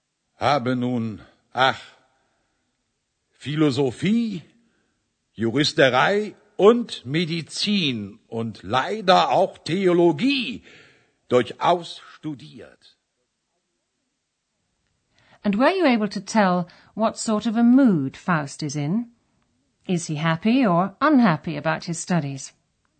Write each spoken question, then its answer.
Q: Is he happy or unhappy about his studies?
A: shows he's unhappy